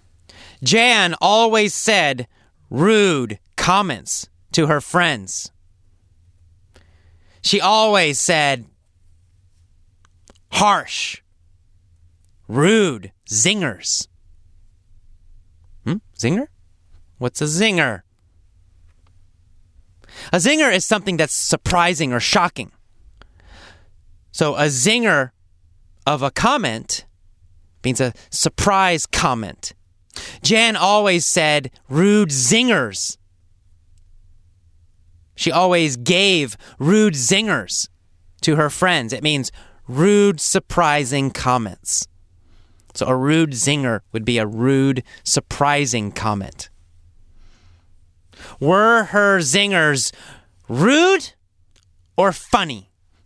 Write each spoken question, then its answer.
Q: Were her zingers rude or funny?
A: Her zingers were rude.